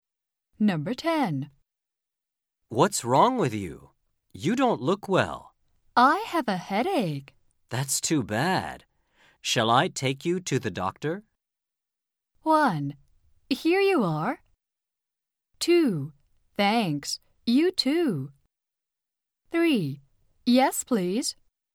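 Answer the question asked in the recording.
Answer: 3: Yes, please.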